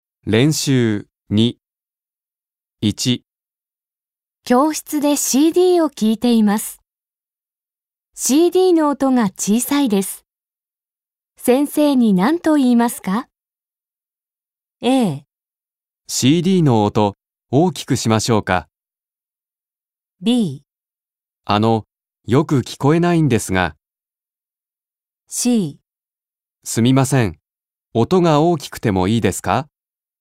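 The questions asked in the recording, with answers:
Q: 先生に何と言いますか?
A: B: よく聞こえないんですが。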